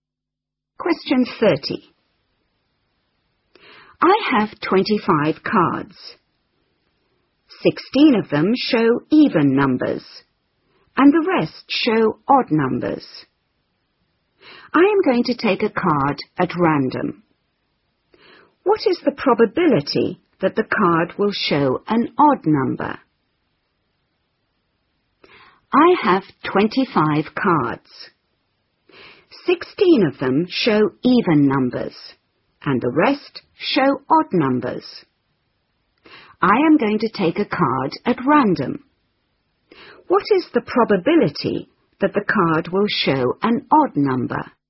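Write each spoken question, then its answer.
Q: What is the probability that the card will show an odd number?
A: 9/25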